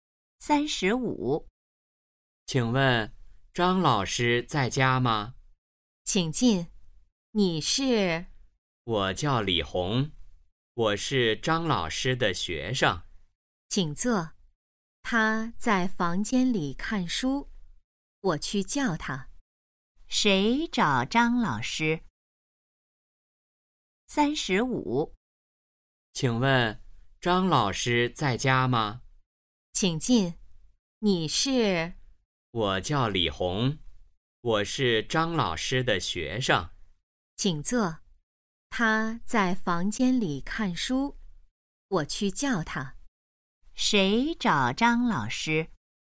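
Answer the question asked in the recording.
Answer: 李红(张老师的学生)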